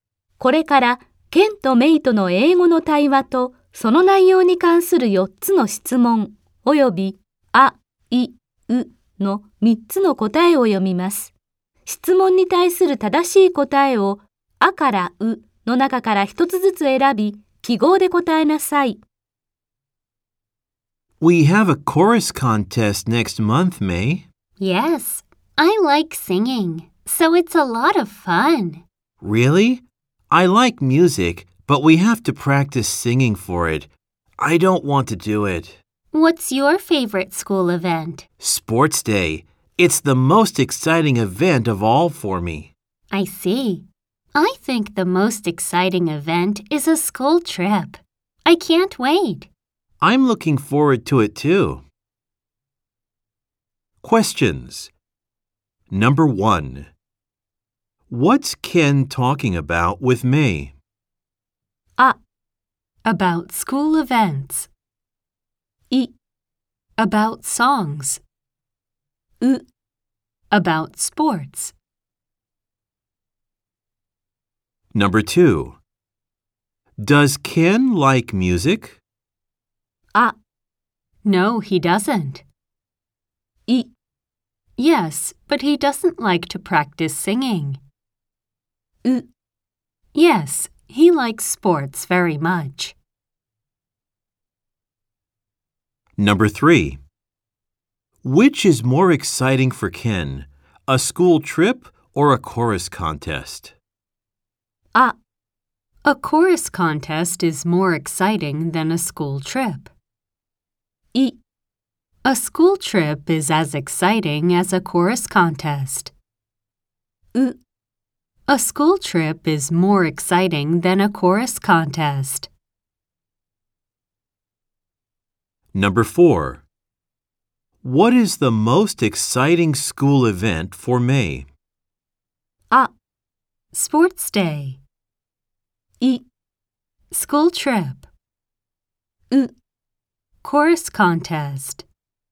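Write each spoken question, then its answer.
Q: What's Ken talking about with May?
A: あ: About school events.

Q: Does Ken like music?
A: い: Yes, but he doesn't like to practice singing.

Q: Which is more exciting for Ken, a school trip or a chorus contest?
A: う: A school trip is more exciting than a chorus contest.

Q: What is the most exciting school event for May?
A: あ: Sports day.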